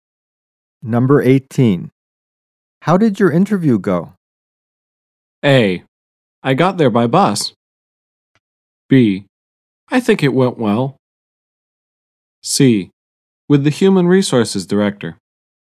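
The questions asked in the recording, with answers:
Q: How did your interview go?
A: B: I think it went well.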